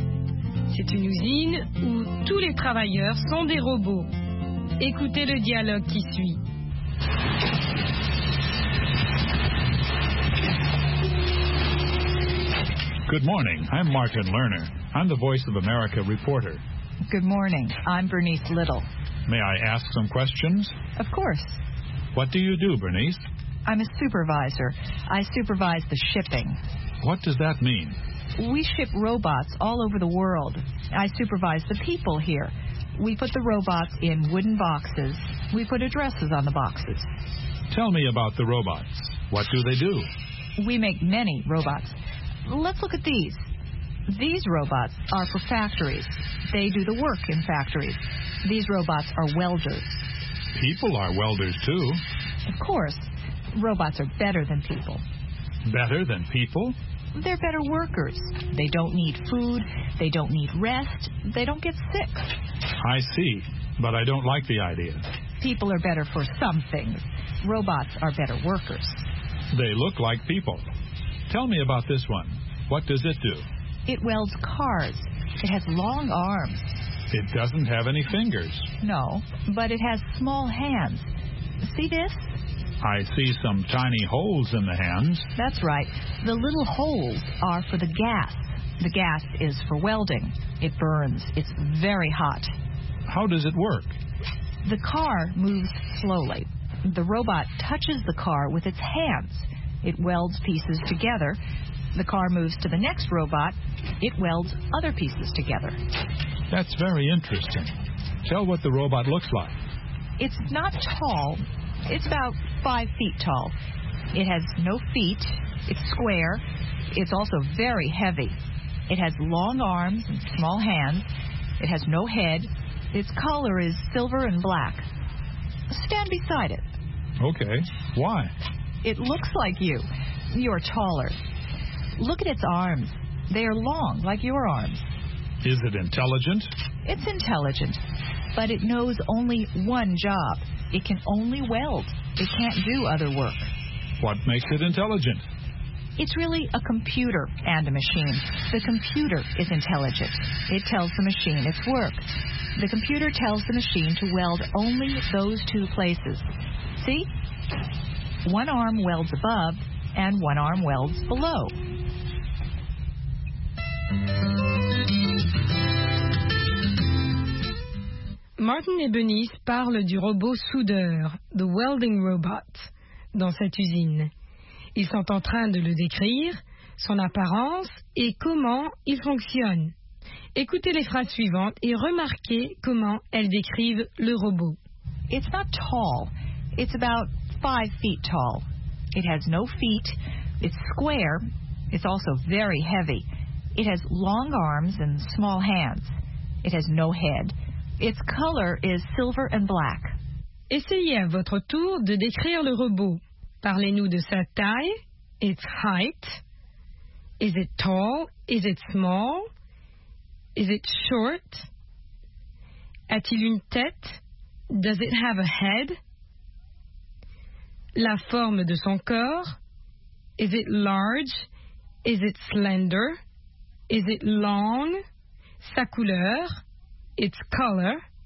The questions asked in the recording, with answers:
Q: Is it tall?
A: not tall

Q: Does it have a head?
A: no head

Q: Its color?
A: silver and black